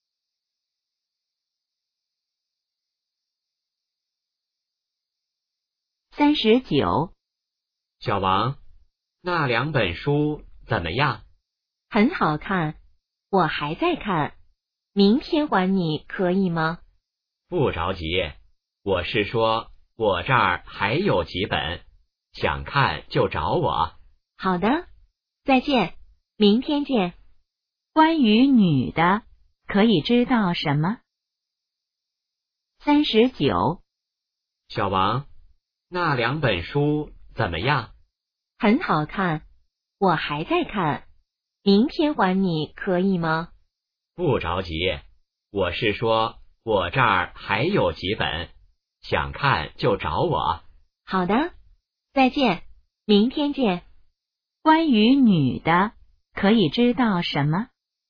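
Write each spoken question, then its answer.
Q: 关于女的,可以知道什么?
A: 书还没看完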